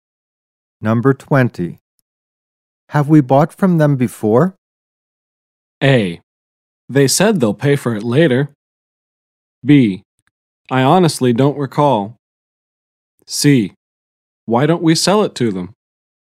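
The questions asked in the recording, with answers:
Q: Have we bought from them before?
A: B: I honestly don't recall.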